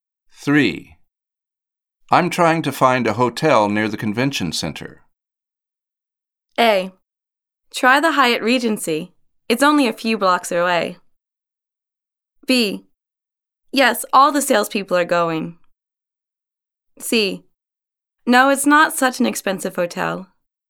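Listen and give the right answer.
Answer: A: Try the Hyatt Regency. It's only a few blocks away.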